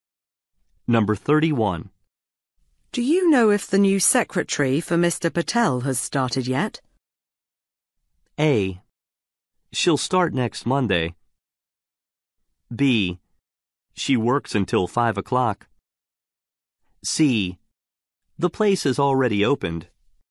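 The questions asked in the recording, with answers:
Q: Do you know if the new secretary for Mr. Patel has started yet?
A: A: She'll start next Monday.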